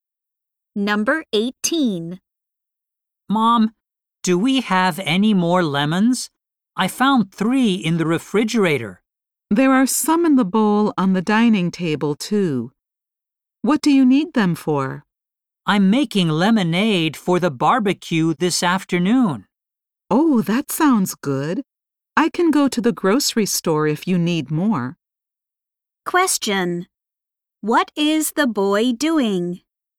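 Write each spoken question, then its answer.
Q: What is the boy doing?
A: Making lemonade for the barbecue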